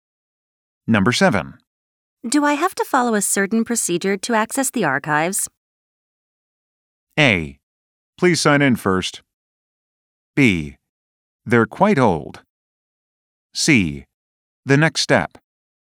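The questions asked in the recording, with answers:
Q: Do I have to follow a certain procedure to access the archives?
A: A: Please sign in first.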